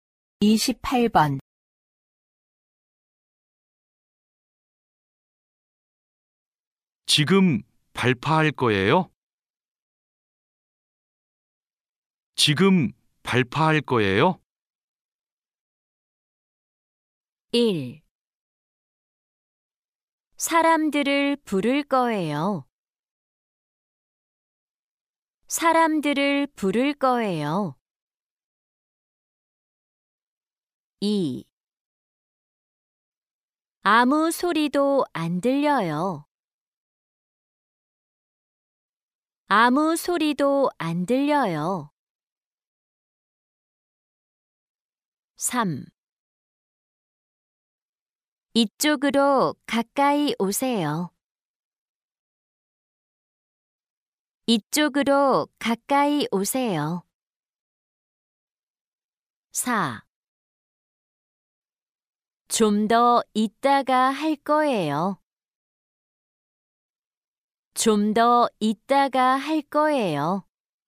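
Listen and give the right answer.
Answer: 4: 좀 더 이따가 할 거예요.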